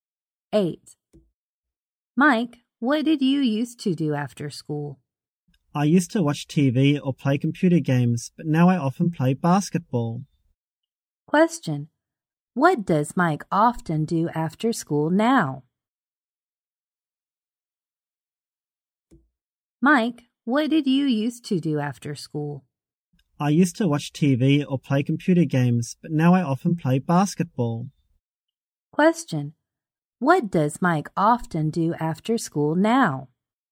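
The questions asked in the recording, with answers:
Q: What does Mike often do after school now?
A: He plays basketball.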